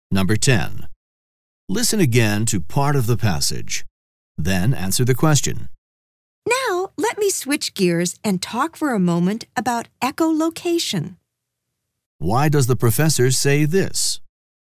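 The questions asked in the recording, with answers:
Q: Why does the professor say this?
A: To signal a change of topic to echolocation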